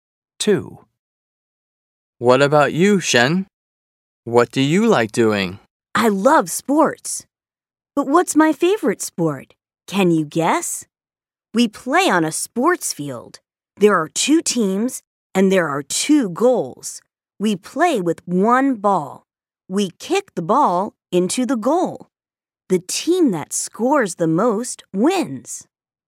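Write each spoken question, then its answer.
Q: But what's my favorite sport?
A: soccer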